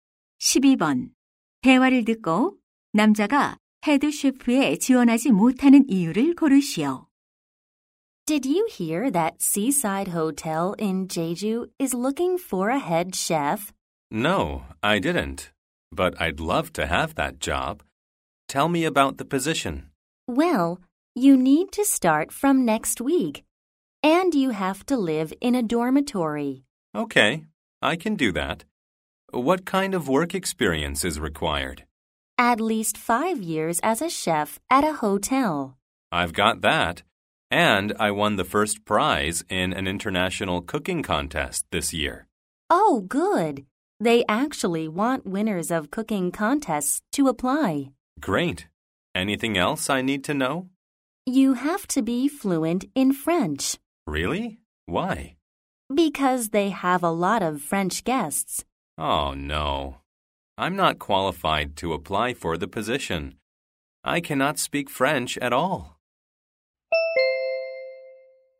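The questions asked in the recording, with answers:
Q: 대화를 듣고 남자가 헤드 셰프에 지원하지 못하는 이유를 고르시오.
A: 프랑스어를 전혀 못해서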